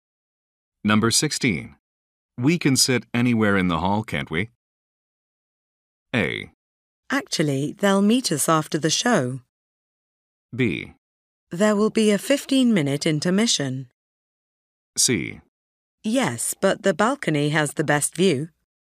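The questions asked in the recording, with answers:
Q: We can sit anywhere in the hall, can't we?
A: C: Yes, but the balcony has the best view.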